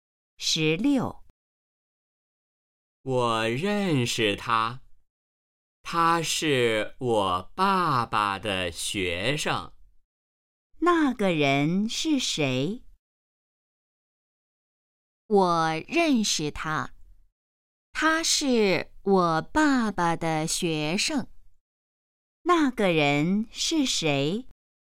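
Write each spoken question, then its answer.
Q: 那个人是谁?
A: 他爸爸的学生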